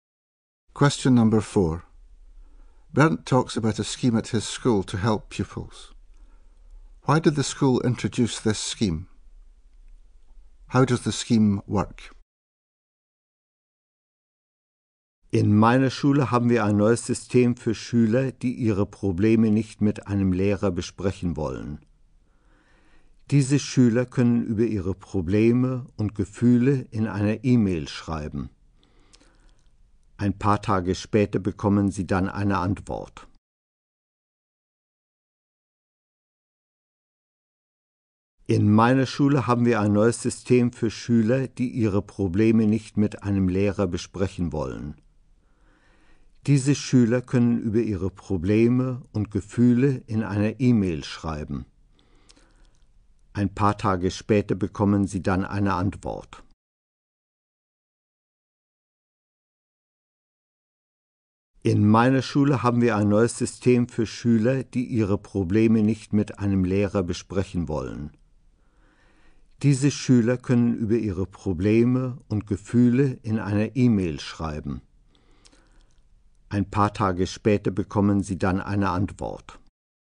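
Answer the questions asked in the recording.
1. For pupils who don't want to discuss their problems with a teacher
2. Pupils write about their problems and feelings in an e-mail and get a reply a few days later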